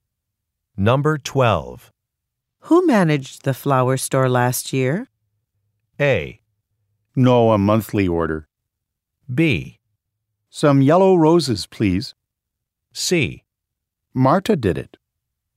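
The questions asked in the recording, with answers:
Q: Who managed the flower store last year?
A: C: Marta did it.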